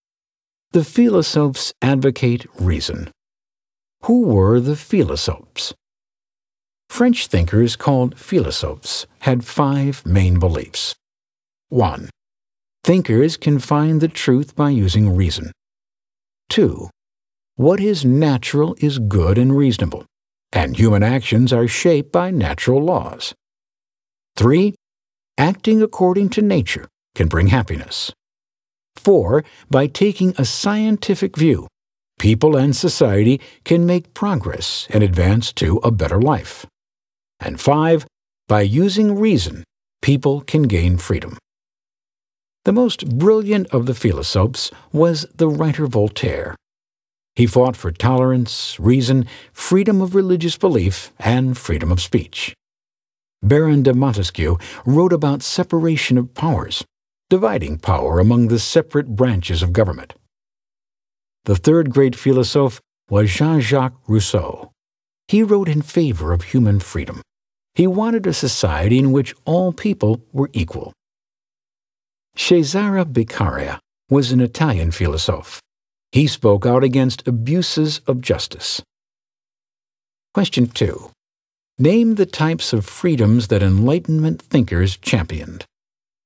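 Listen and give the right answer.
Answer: Freedom of religious belief, freedom of speech, and human freedom in general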